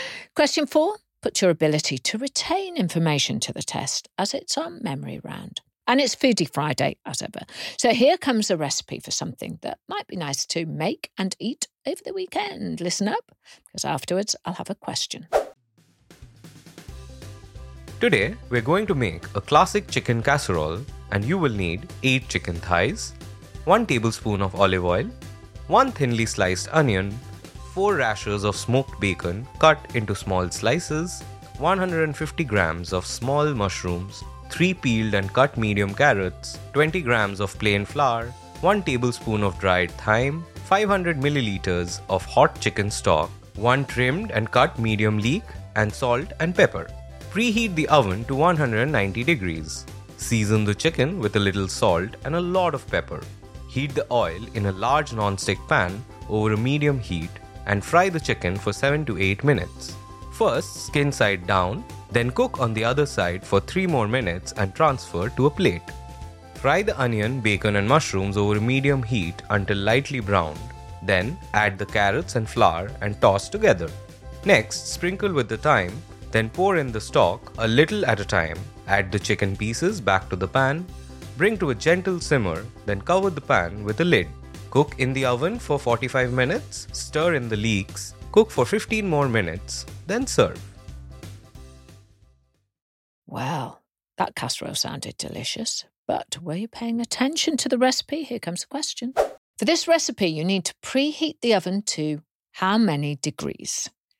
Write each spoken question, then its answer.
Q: For this recipe, you need to preheat the oven to how many degrees?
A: The answer was 190 degrees.